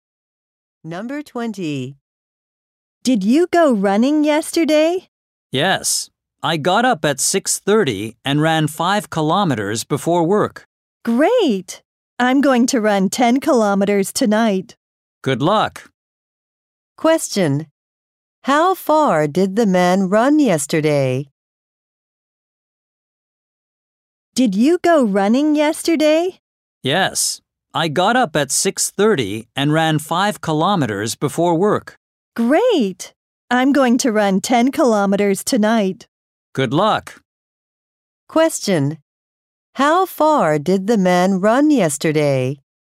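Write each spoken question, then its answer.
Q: How far did the man run yesterday?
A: 5 kilometers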